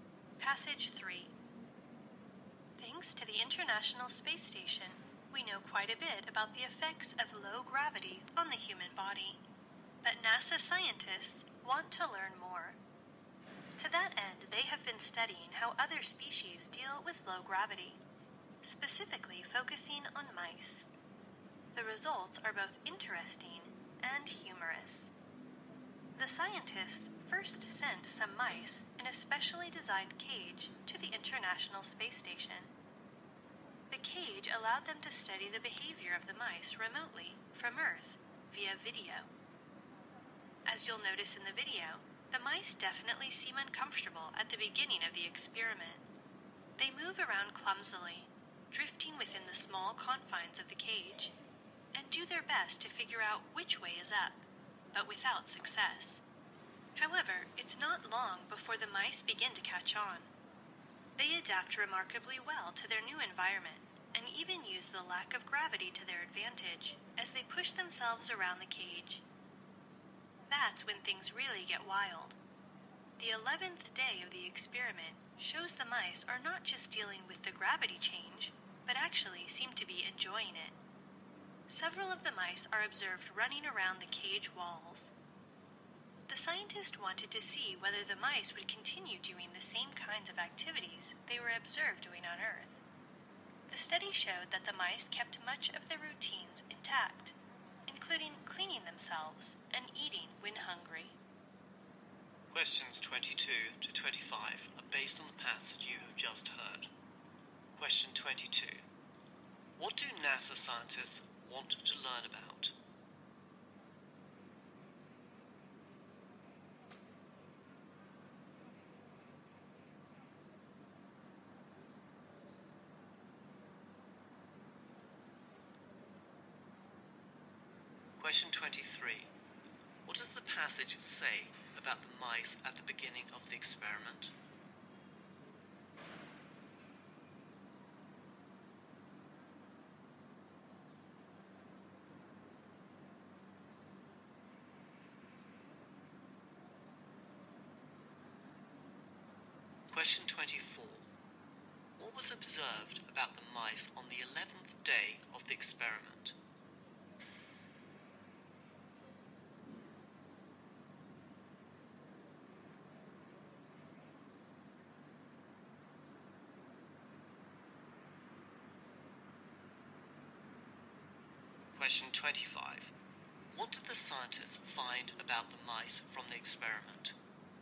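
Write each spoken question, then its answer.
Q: What do NASA scientists want to learn about?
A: How other species deal with low gravity.

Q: What does the passage say about the mice at the beginning of the experiment?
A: They seemed uncomfortable and moved around clumsily.

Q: What was observed about the mice on the 11th day of the experiment?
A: They seemed to enjoy it and ran around the cage walls.

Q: What did the scientists find about the mice from the experiment?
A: They kept most of their routines, such as cleaning themselves and eating.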